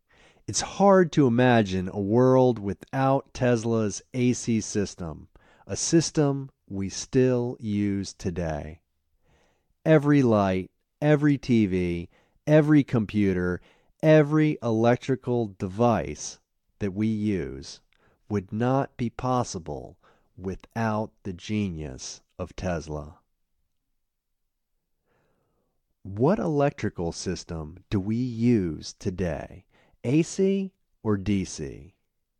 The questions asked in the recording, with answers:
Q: What electrical system do we use today?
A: We use Tesla's AC system today.